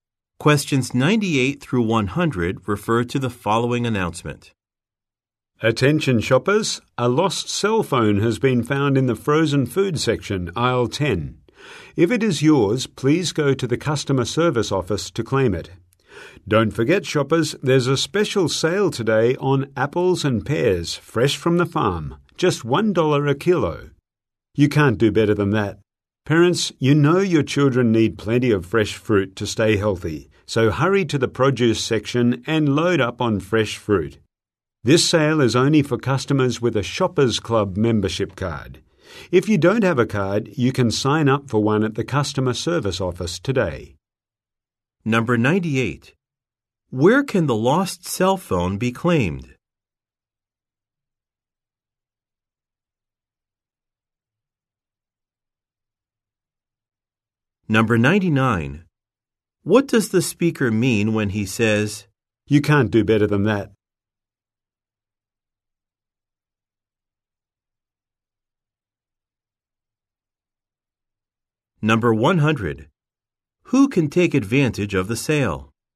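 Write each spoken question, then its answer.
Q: Where can the lost cell phone be claimed?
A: At the customer service office

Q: "You can't do better than that"?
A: The price is very good

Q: Who can take advantage of the sale?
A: Customers with a Shoppers Club membership card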